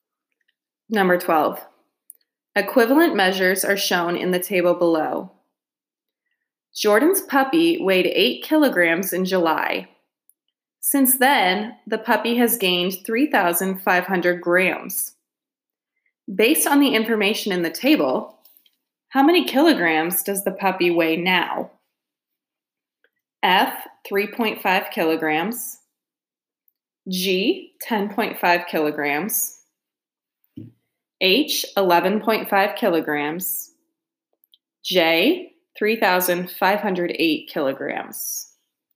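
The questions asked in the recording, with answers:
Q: Based on the information in the table, how many kilograms does the puppy weigh now?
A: H: 11.5 kilograms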